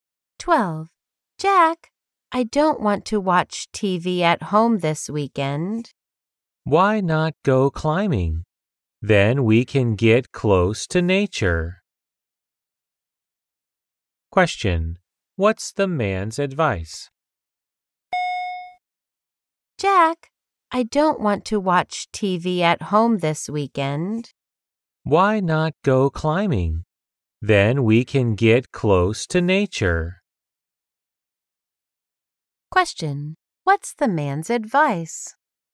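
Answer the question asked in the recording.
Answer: Go climbing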